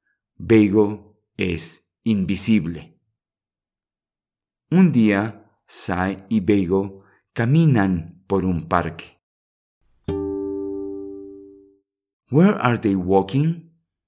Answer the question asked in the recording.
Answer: Sí, a park.